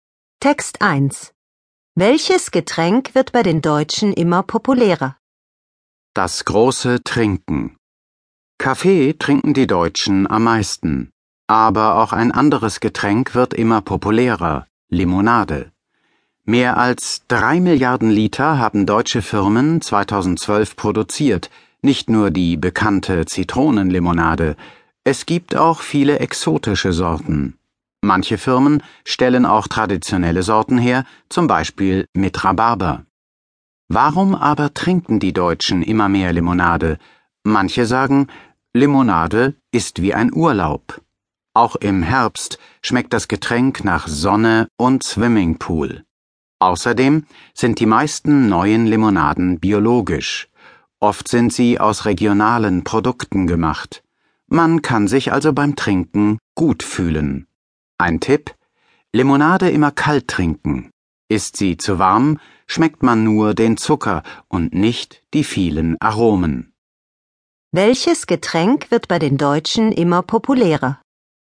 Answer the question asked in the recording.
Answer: Limonade wird immer populärer.